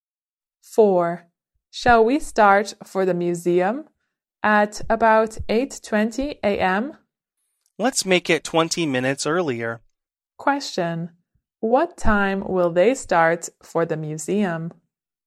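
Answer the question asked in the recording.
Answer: At 8:00 a.m.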